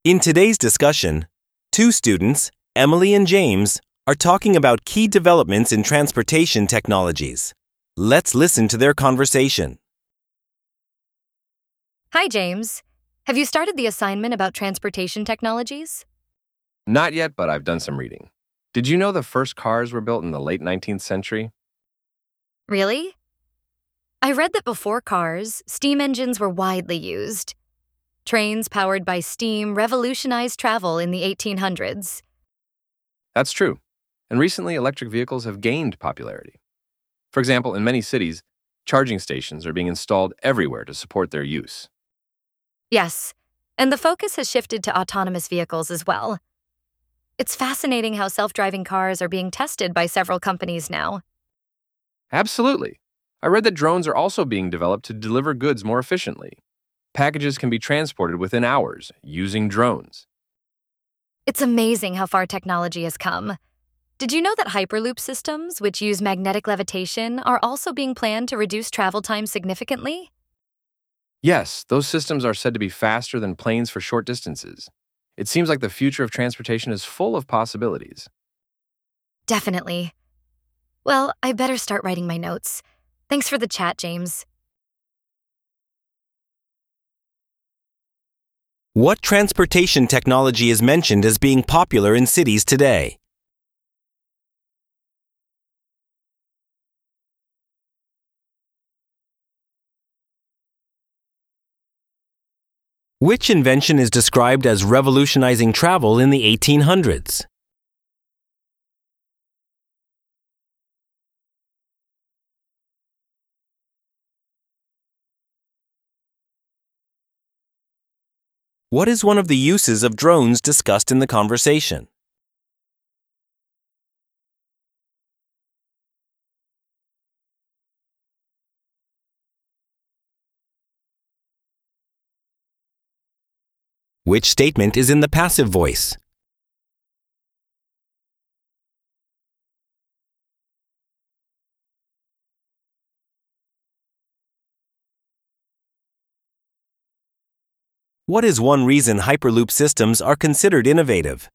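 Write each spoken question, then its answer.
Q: What transportation technology is mentioned as being popular in cities today?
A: Electric vehicles

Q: Which invention is described as revolutionizing travel in the 1800s?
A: Steam-powered trains

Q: What is one of the uses of drones discussed in the conversation?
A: Delivering goods/packages more efficiently

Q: What is one reason Hyperloop systems are considered innovative?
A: They use magnetic levitation to cut travel time a lot, and are faster than planes over short distances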